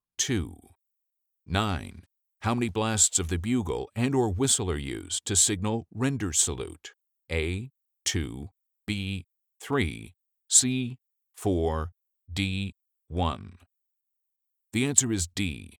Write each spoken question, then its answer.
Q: How many blasts of the bugle and or whistle are used to signal render salute?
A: The answer is D. 1.